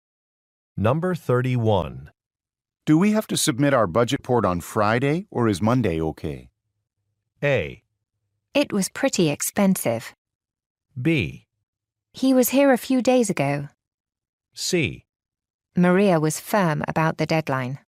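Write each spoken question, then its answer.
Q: Do we have to submit our budget report on Friday, or is Monday okay?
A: C: Maria was firm about the deadline.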